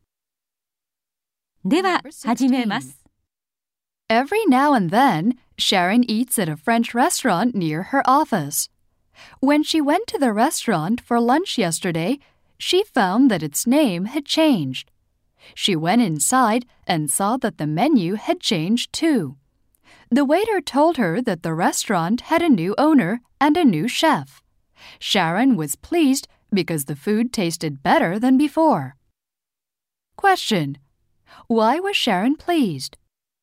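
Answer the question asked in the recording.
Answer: The food tasted better than before.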